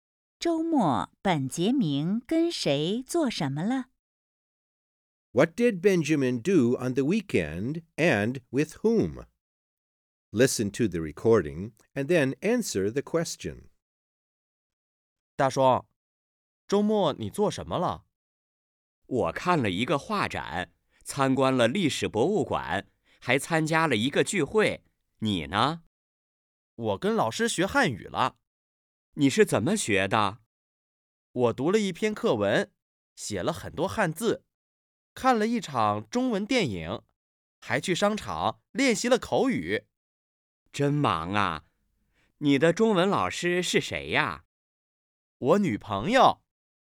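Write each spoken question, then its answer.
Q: 周末,本杰明跟谁做什么了?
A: 跟女朋友学汉语了:读了一篇课文,写了很多汉字,看了一场中文电影,还去商场练习了口语。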